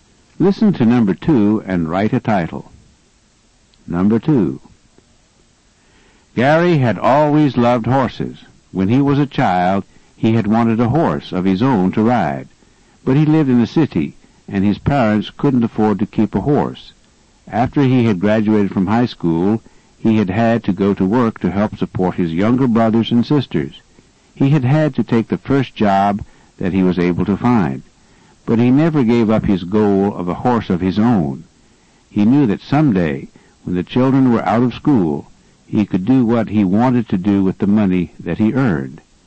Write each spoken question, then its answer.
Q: Listen to number 2 and write a title.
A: Your answer could be something like, someday a horse of his own, or his goal, a horse.